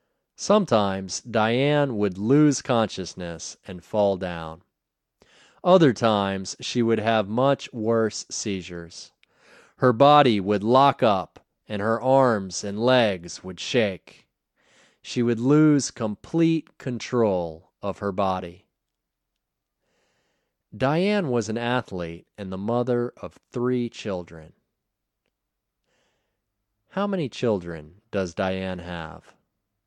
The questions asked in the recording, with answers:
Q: How many children does Diane have?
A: Diane has 3 children.